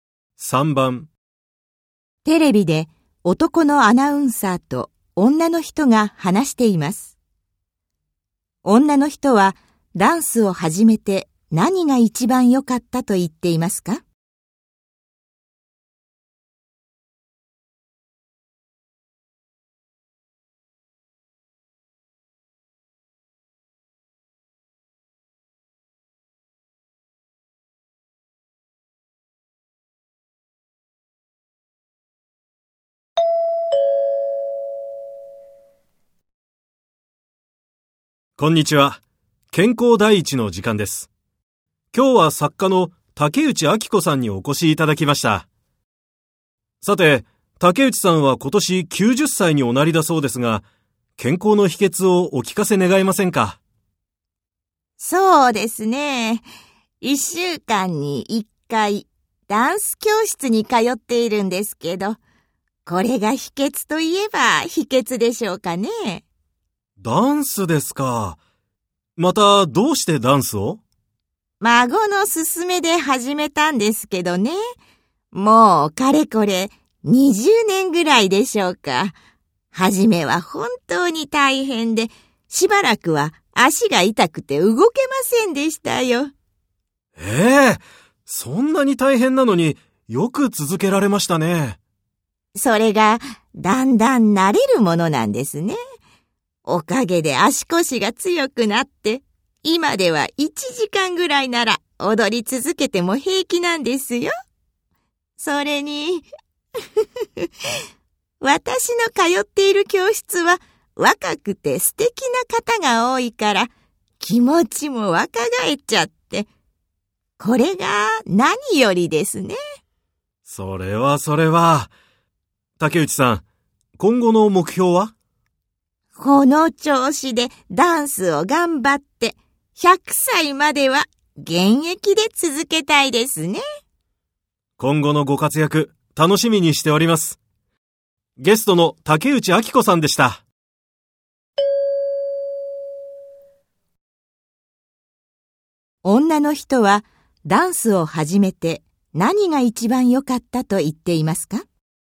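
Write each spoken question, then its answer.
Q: 女の人はダンスを始めて何が一番良かったと言っていますか?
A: 若い人と一緒に踊って気持ちが若返ったこと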